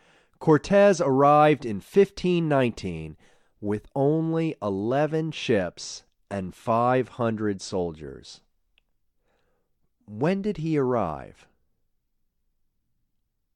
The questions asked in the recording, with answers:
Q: When did he arrive?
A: He arrived in 1519.